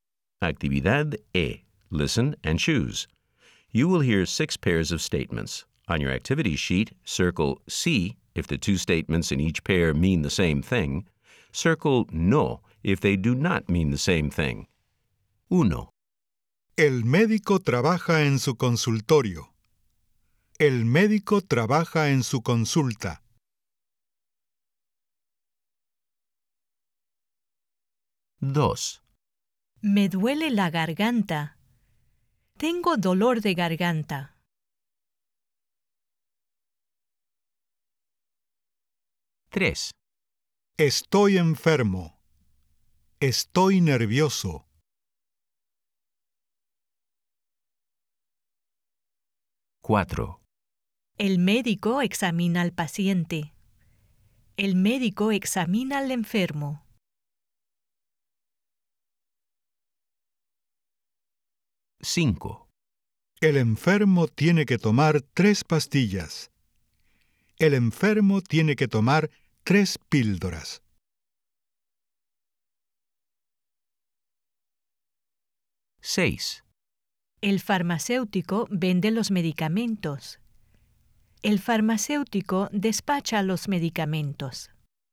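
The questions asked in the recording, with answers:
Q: El médico trabaja en su consultorio. El médico trabaja en su consulta.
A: Sí

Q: Me duele la garganta. Tengo dolor de garganta.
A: Sí

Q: Estoy enfermo. Estoy nervioso.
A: No

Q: El médico examina al paciente. El médico examina al enfermo.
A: Sí

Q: El enfermo tiene que tomar tres pastillas. El enfermo tiene que tomar tres píldoras.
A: Sí

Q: El farmacéutico vende los medicamentos. El farmacéutico despacha los medicamentos.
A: Sí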